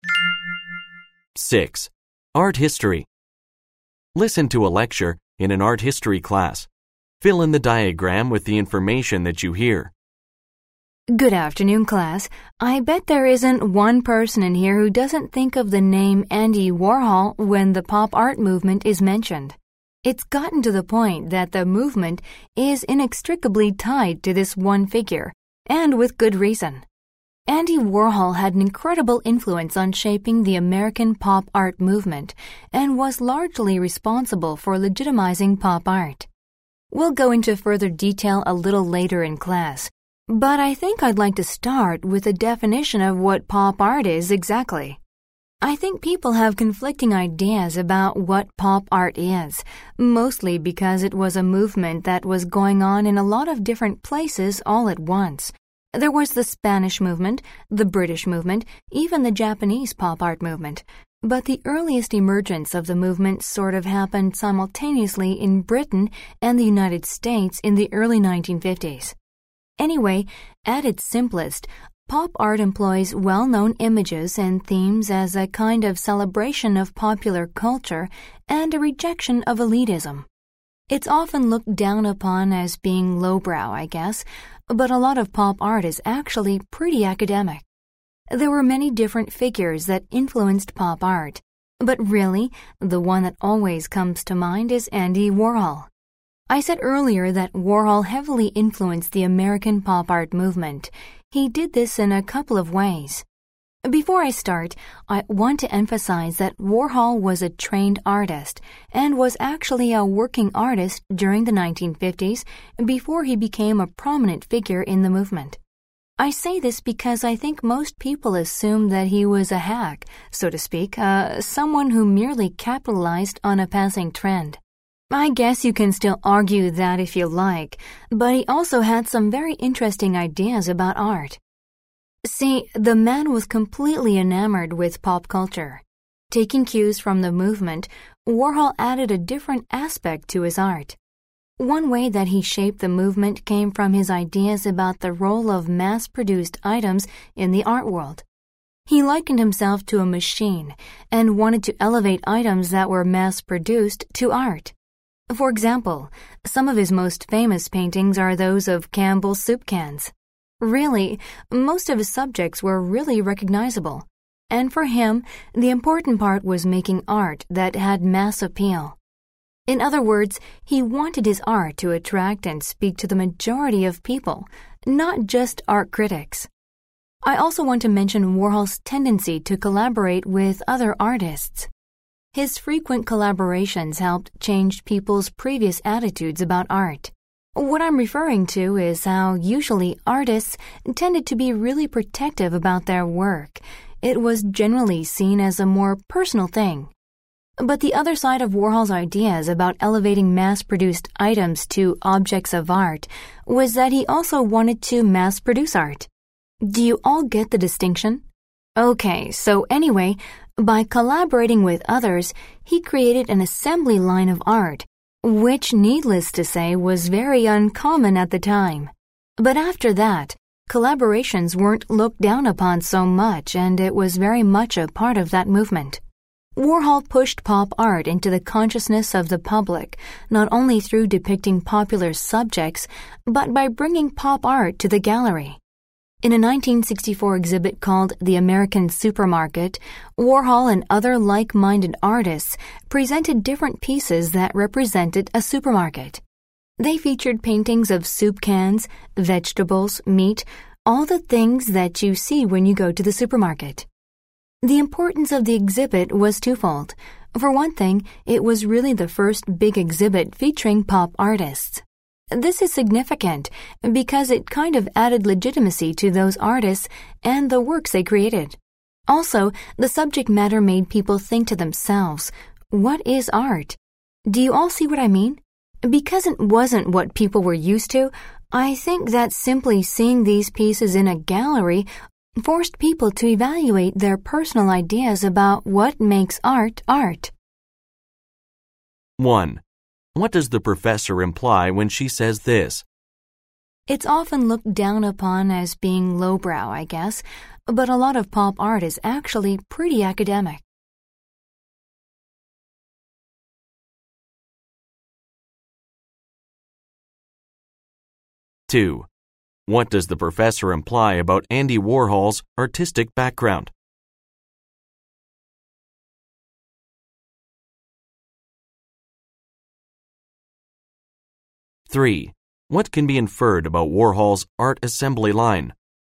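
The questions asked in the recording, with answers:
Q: What does the professor imply when she says this?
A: Pop art is more intellectual and serious than many people think

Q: What does the professor imply about Andy Warhol's artistic background?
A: He was a trained, working artist before pop art, not just a hack following a trend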